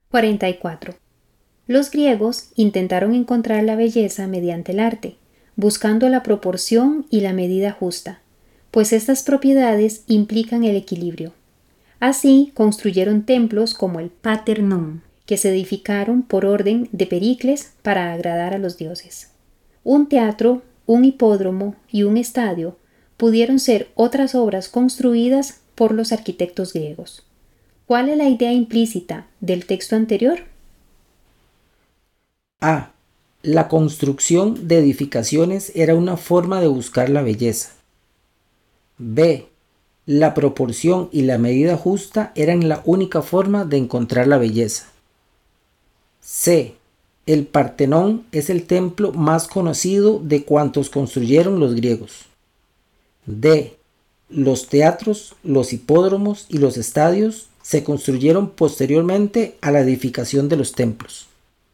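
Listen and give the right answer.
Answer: A: La construcción de edificaciones era una forma de buscar la belleza.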